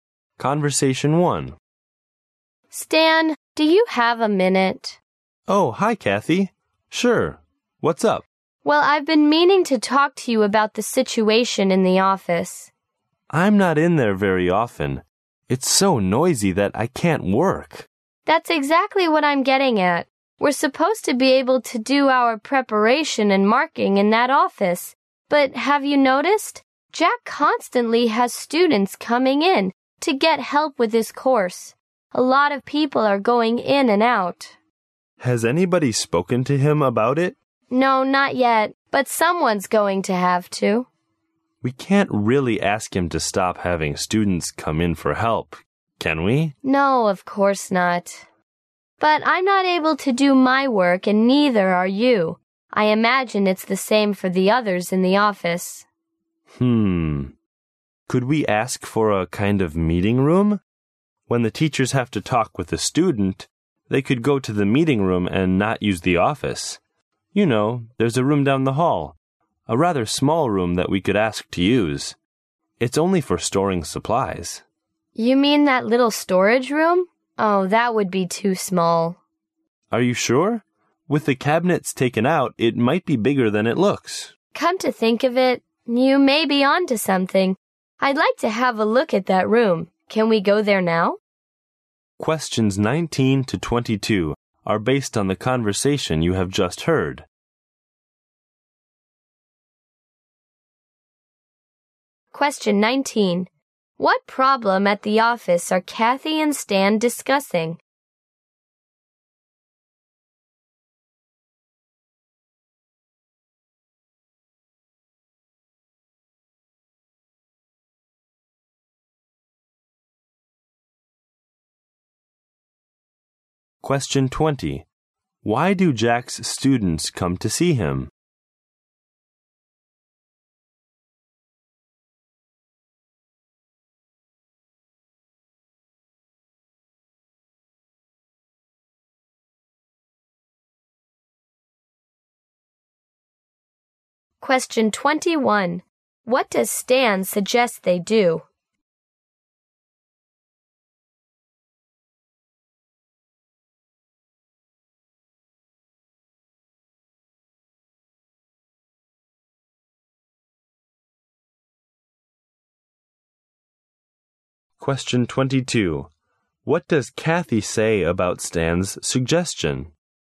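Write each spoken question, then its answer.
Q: What problem at the office are Kathy and Stan discussing?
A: The office is too noisy to work in

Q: Why do Jack's students come to see him?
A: To get help with his course

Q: What does Stan suggest they do?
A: Ask to use the small storage room as a meeting room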